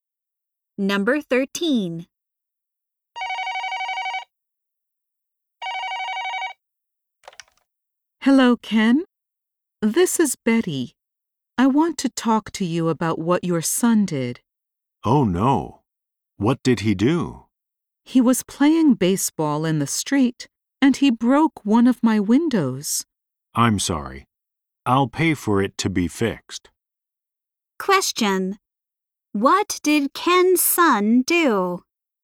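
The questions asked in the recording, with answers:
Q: What did Ken's son do?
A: He broke Betty's window playing baseball.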